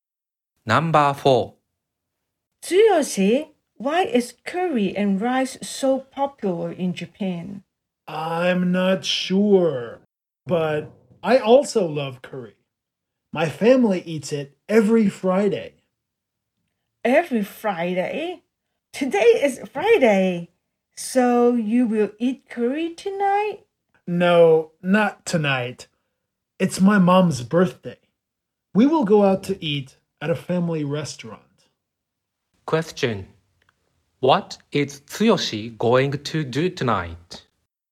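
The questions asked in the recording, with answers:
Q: Question. What is Tsuyoshi going to do tonight?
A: Go out to eat at a family restaurant for his mom's birthday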